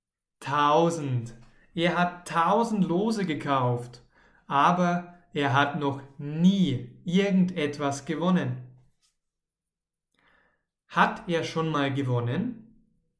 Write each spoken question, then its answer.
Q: Hat er schon mal gewonnen?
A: Nein, noch nie. Er hat noch nie irgendetwas gewonnen.